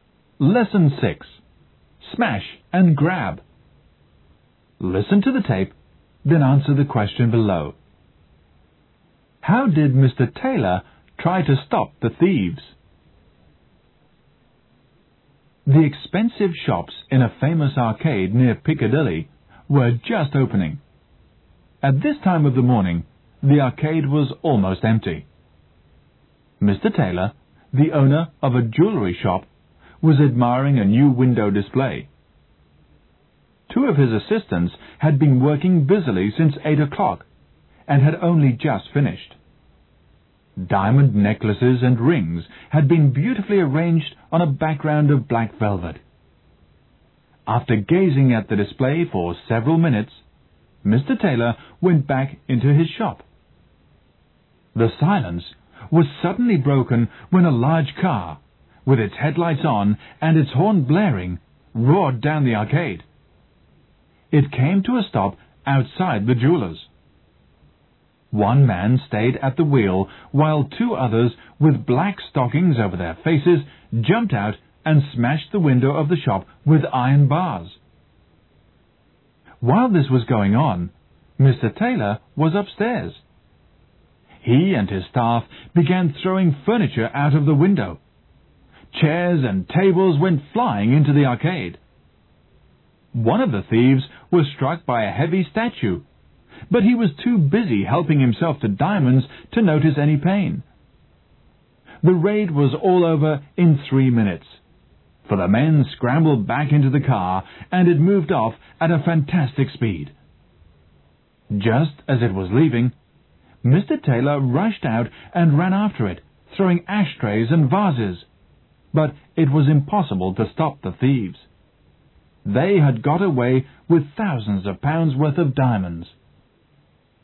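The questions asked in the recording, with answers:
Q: How did Mr. Taylor try to stop the thieves?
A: He and his staff threw furniture out of the window, and he ran after the car throwing ashtrays and vases.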